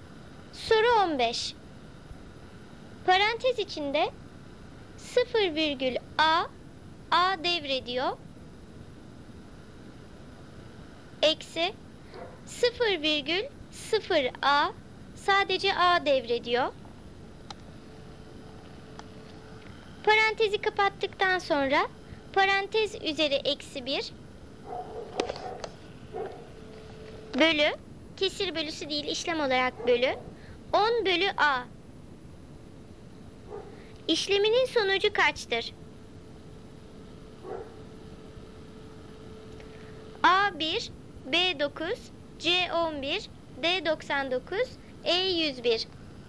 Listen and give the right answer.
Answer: Doğru cevap A1.